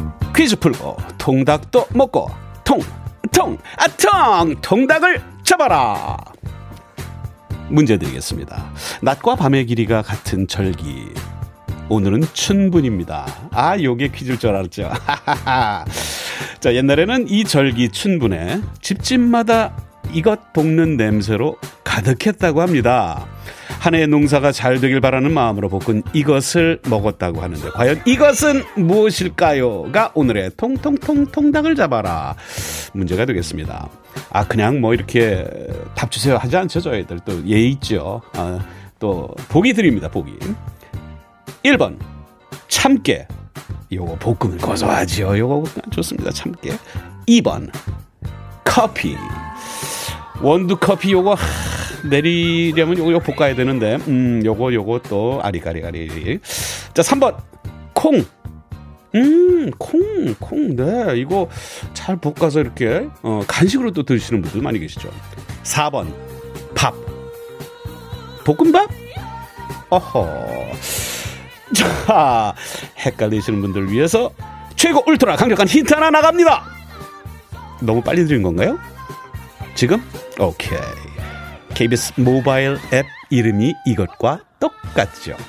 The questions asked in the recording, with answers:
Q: 한 해의 농사가 잘 되길 바라는 마음으로 볶은 이것을 먹었다고 하는데 과연 이것은 무엇일까요?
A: 정답은 두구두구두구두구두구두구두구 콩!